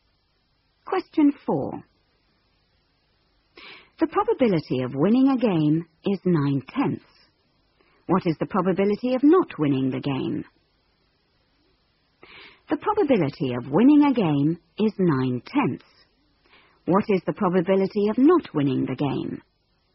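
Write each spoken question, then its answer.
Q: What is the probability of not winning the game?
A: 1/10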